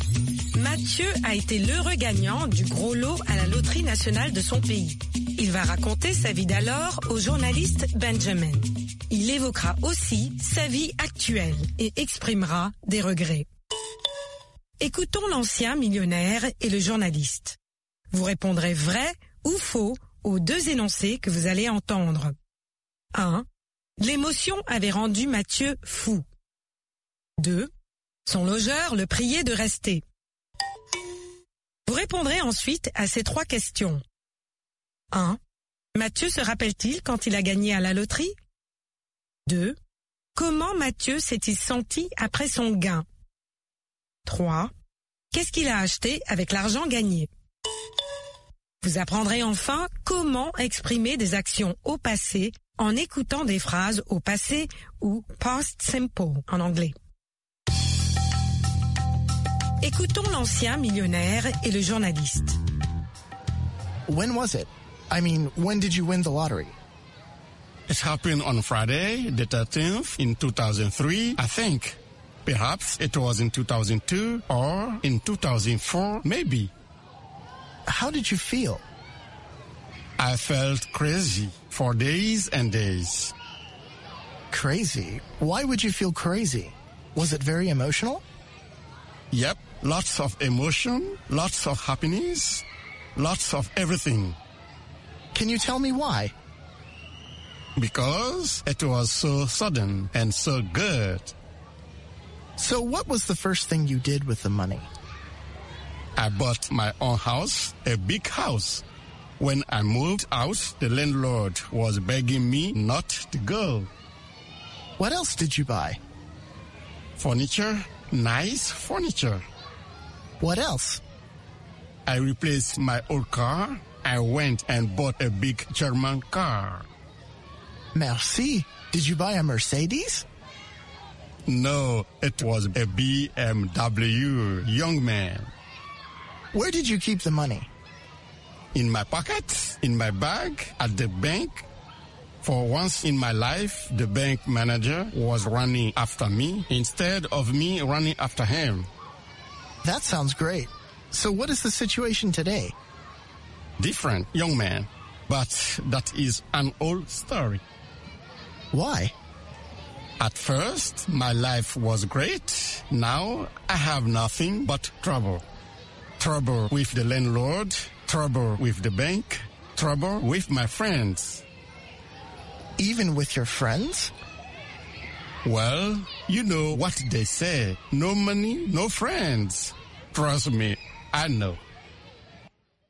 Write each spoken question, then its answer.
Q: Mathieu se rappelle-t-il quand il a gagné à la loterie?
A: Non.

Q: Son logeur le priait de rester.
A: L'énoncé 2 est vrai. Son logeur l'a prié de rester.

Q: Qu'est-ce qu'il a acheté avec l'argent gagné?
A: Une maison, des meubles et une voiture.